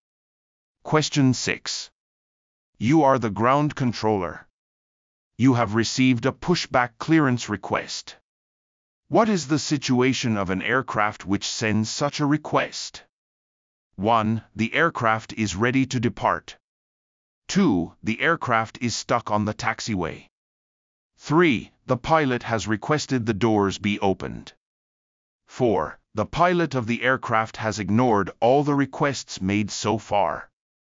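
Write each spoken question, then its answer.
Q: What is the situation of an aircraft which sends such a request?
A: 1: The aircraft is ready to depart.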